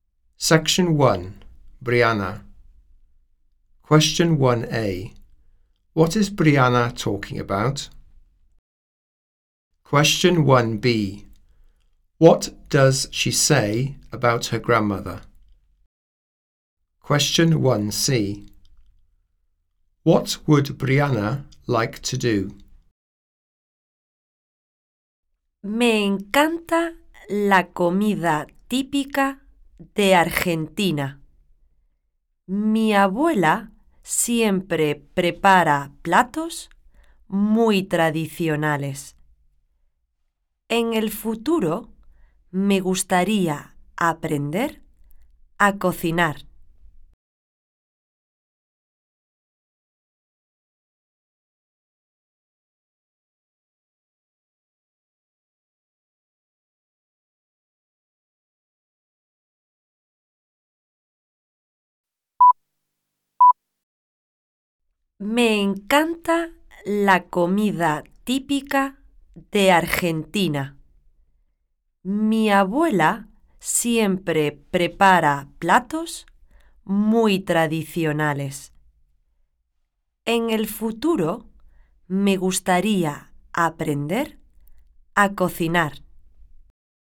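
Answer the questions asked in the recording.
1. Typical Argentinian food
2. She always makes very traditional dishes
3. Learn to cook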